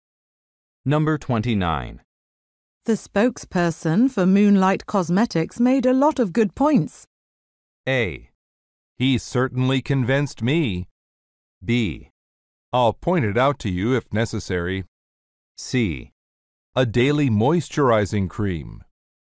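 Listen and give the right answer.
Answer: A: He certainly convinced me.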